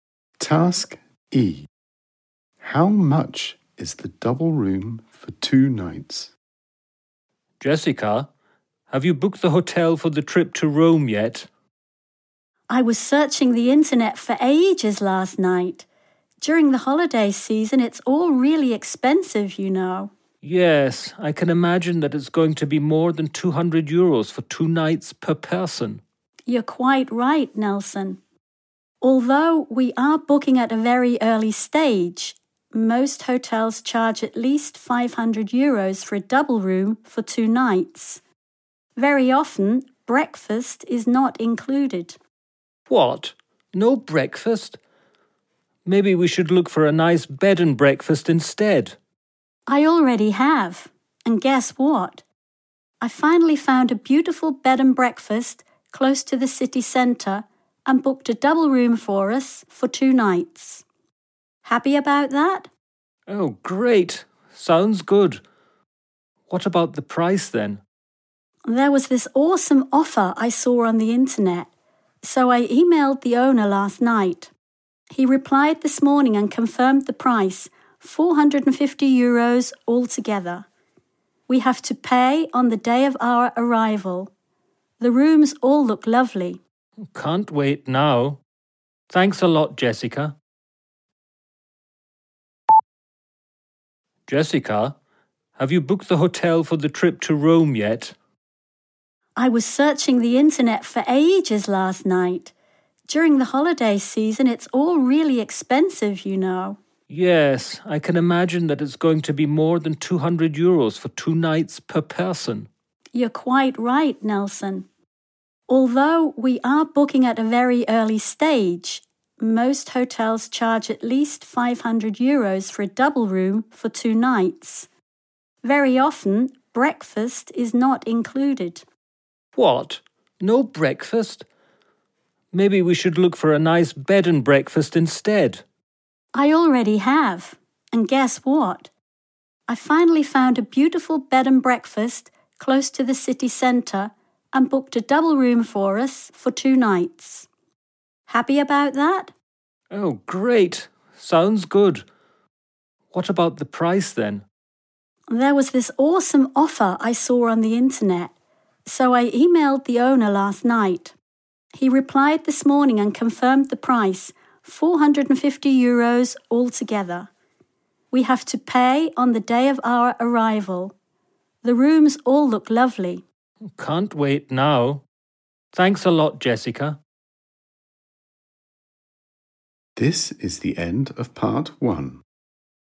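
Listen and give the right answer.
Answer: 450 euros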